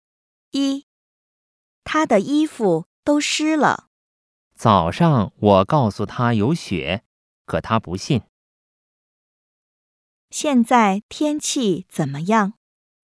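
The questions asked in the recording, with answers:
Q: 现在天气怎么样?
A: 在下雪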